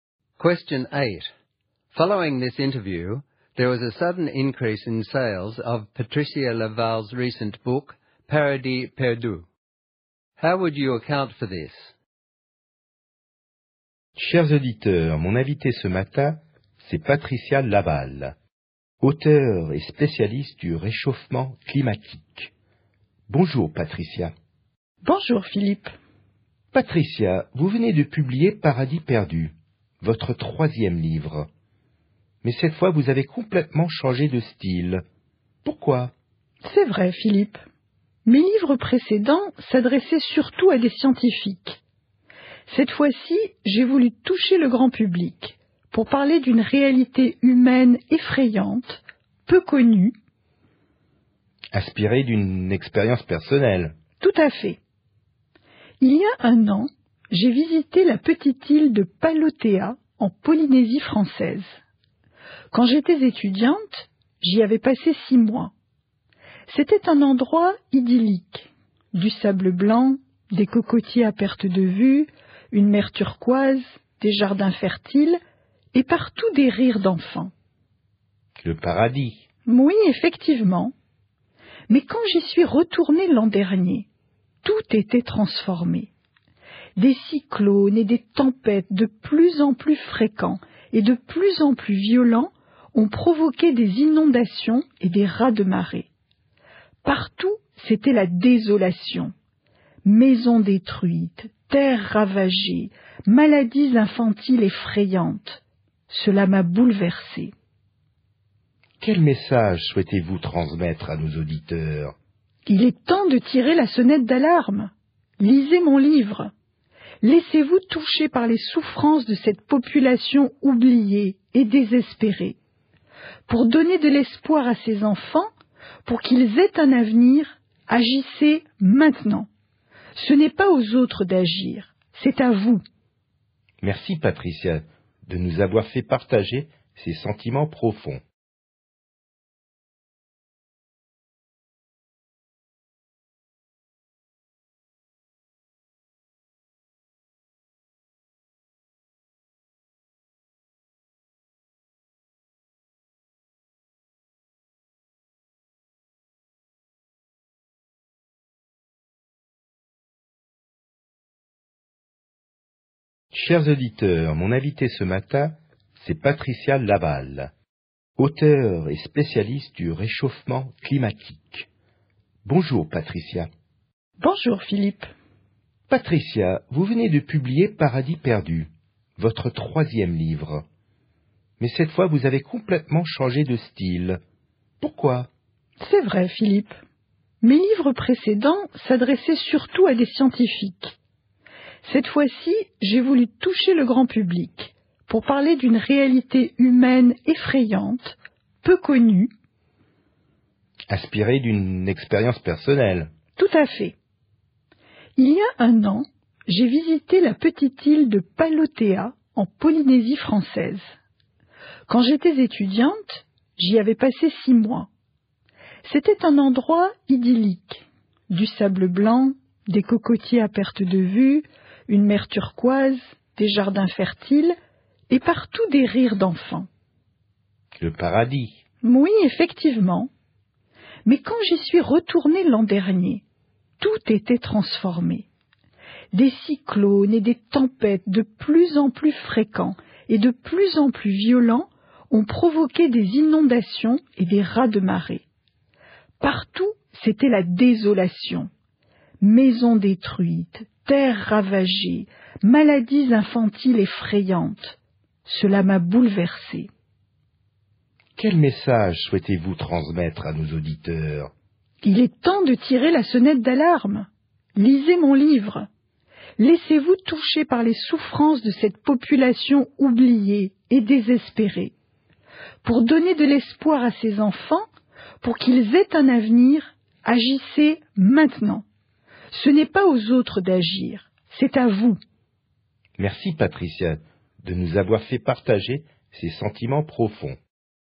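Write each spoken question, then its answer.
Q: How would you account for this?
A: She wrote for the general public and gave a moving personal account of the devastation caused by climate change on a Polynesian island. She urged listeners to read her book and act now.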